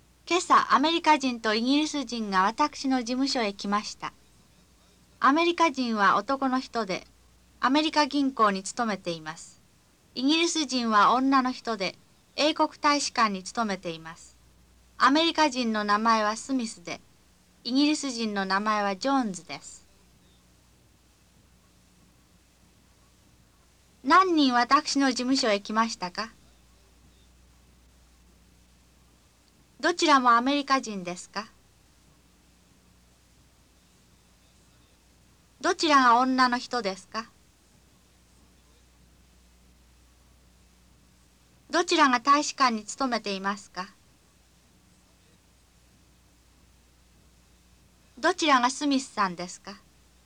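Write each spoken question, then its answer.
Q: 何人私の事務所へ来ましたか?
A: 二人

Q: どちらもアメリカ人ですか?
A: いいえ、一人はイギリス人です

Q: どちらが女の人ですか?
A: イギリス人(ジョーンズさん)

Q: どちらが大使館に勤めていますか?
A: イギリス人(ジョーンズさん)

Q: どちらがスミスさんですか?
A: アメリカ人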